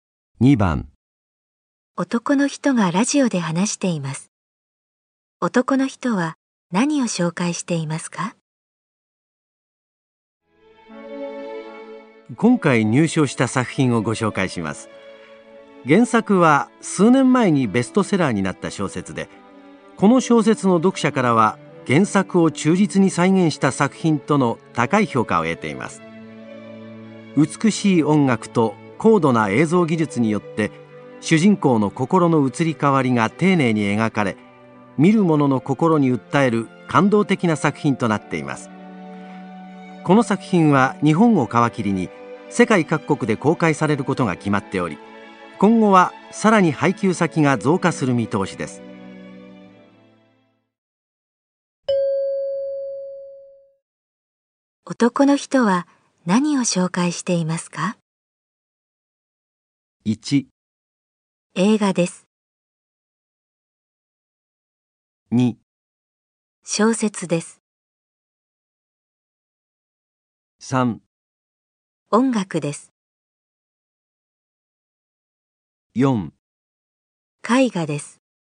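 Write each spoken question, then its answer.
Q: 男の人は何を紹介していま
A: 1: 映画です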